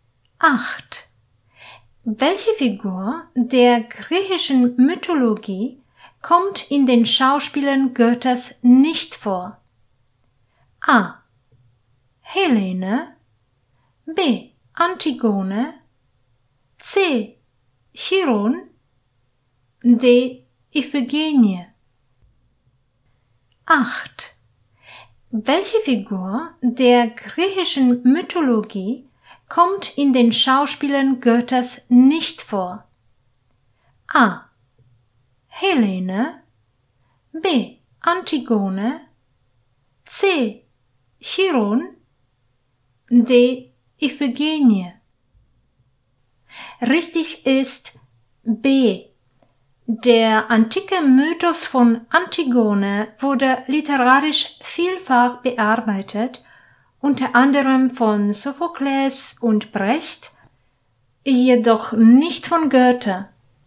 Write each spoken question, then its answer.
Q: Welche Figur der griechischen Mythologie kommt in den Schauspielern Goethes nicht vor?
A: Richtig ist B.